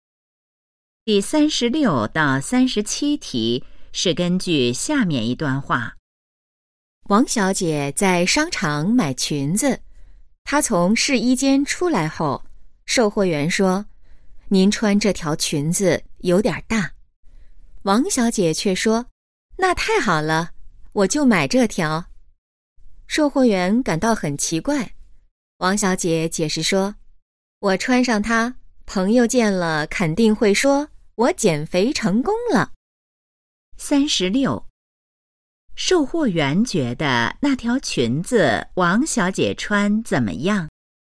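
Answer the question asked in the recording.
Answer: 有点大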